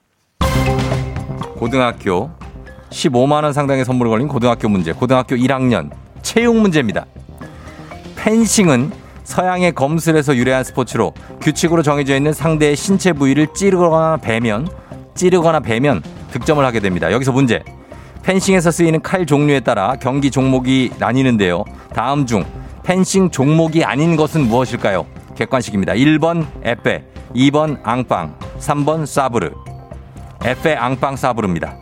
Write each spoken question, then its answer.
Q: 다음 중 펜싱 종목이 아닌 것은 무엇일까요?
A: 정답입니다.